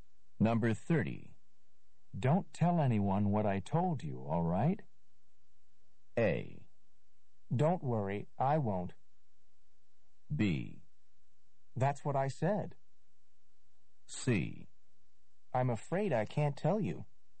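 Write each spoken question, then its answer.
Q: Don't tell anyone what I told you, all right?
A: A: Don't worry, I won't.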